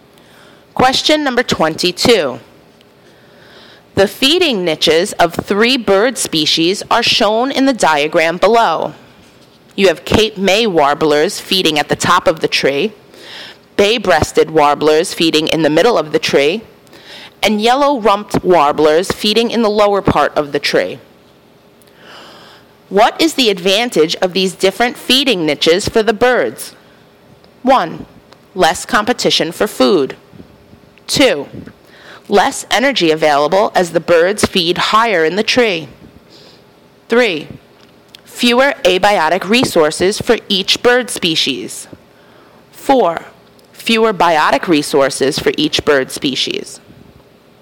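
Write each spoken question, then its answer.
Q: What is the advantage of these different feeding niches for the birds?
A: 1: Less competition for food.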